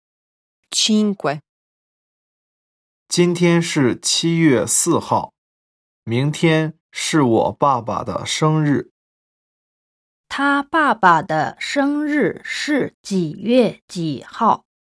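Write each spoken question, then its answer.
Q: 他爸爸的生日是几月几号?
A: 七月五号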